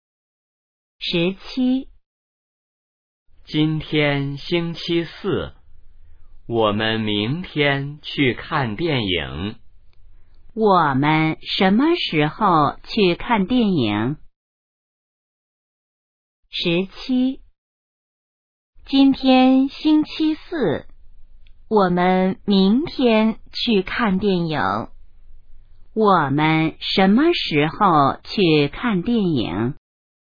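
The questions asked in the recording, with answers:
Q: 我们什么时候去看电影?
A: 明天(星期五)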